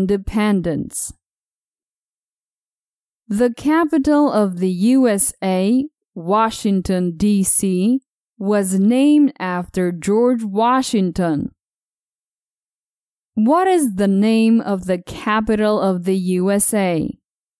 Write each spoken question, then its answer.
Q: What is the name of the capital of the USA?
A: The name of the capital of the USA is Washington, D.C.